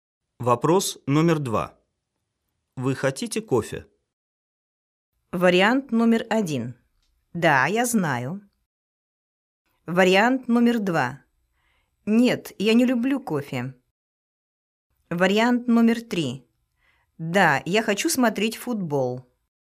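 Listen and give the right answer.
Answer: 2: Нет, я не люблю кофе.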